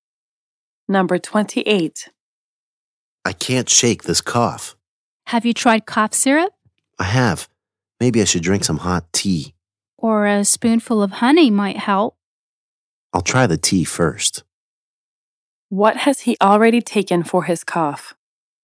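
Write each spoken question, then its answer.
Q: What has he already taken for his cough?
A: Cough syrup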